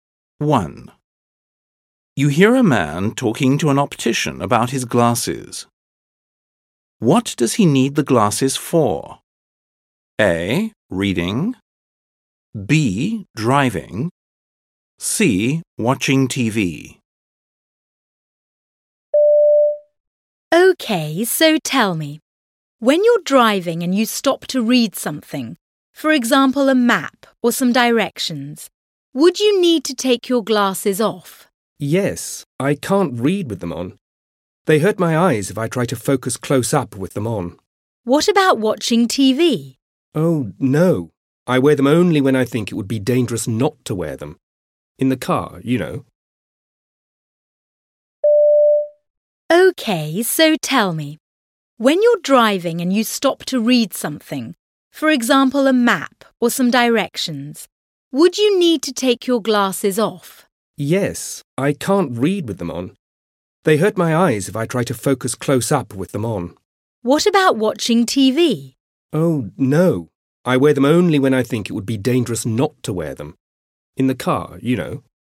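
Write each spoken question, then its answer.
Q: What does he need the glasses for?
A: B: Driving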